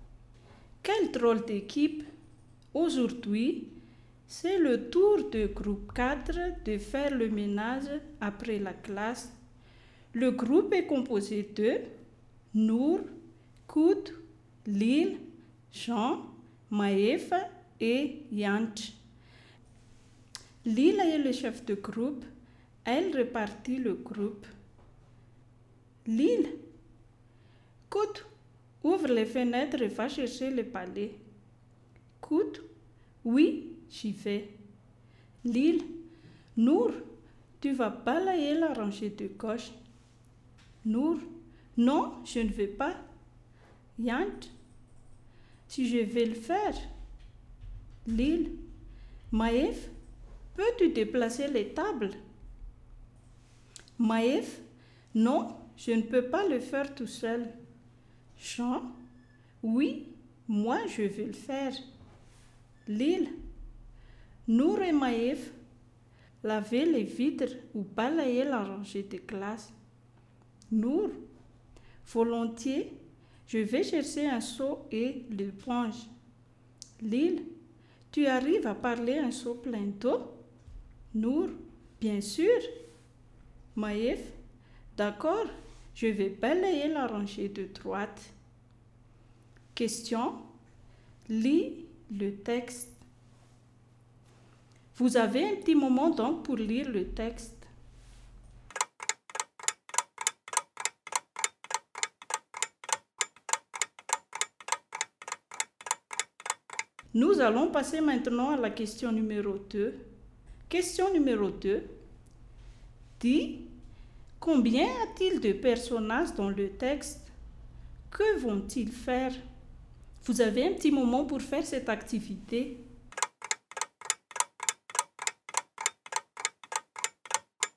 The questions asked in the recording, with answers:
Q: Dis, combien a-t-il de personnages dans le texte?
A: Il y a 6 personnages.

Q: Que vont-ils faire?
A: Et ils vont faire le ménage.